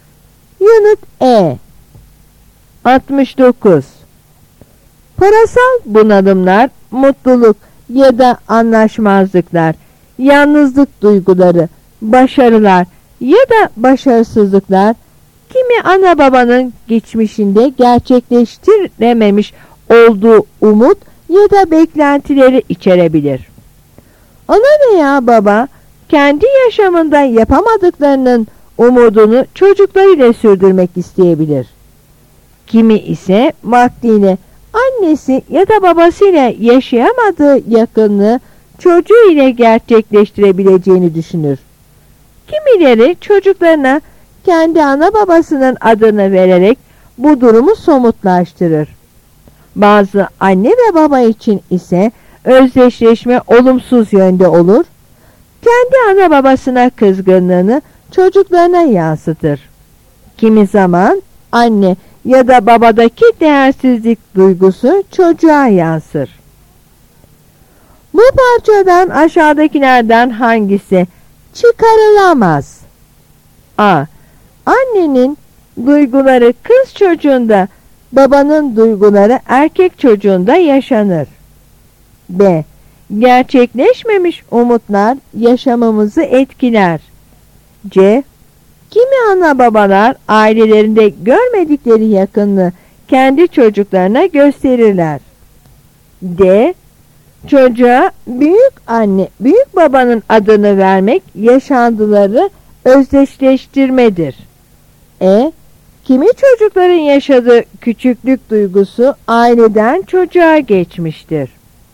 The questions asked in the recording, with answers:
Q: Bu parçadan aşağıdakilerden hangisi çıkarılamaz?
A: Yanıt A.